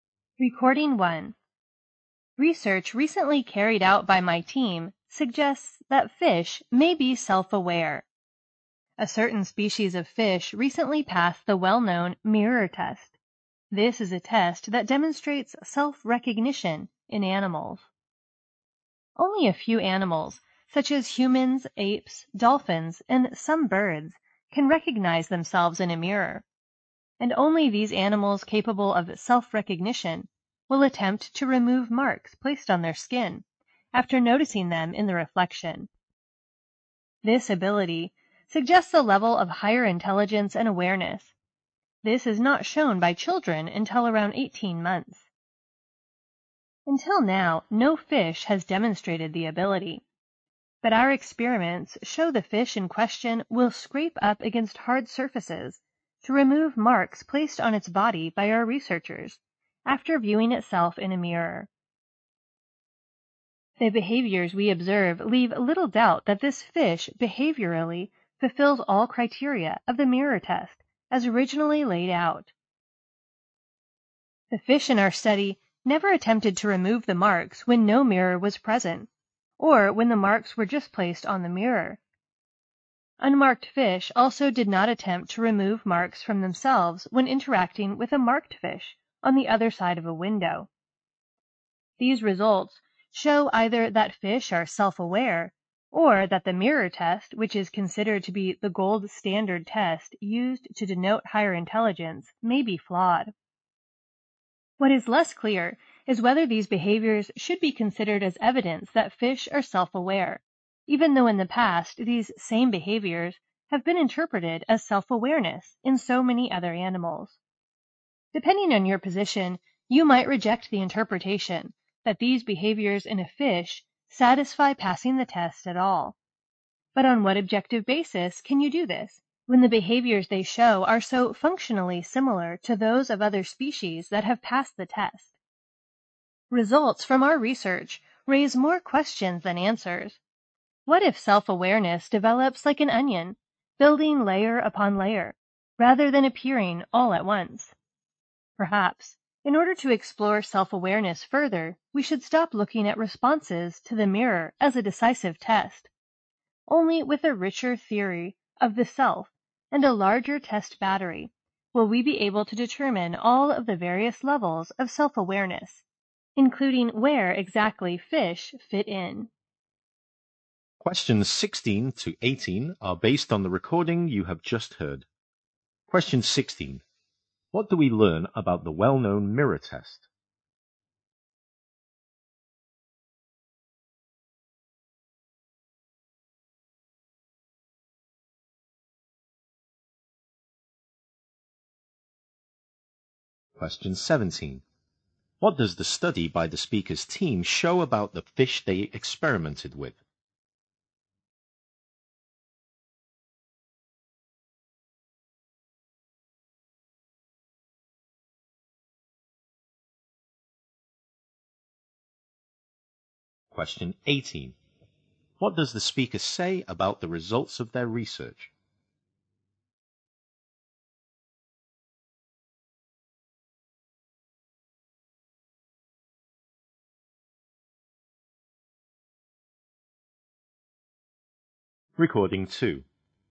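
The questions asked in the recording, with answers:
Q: What do we learn about the well-known mirror test?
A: It shows self-recognition in animals

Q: What does the study by the speaker's team show about the fish they experimented with?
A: They passed the mirror test, removing marks after seeing themselves in a mirror

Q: What does the speaker say about the results of their research?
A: They raise more questions than answers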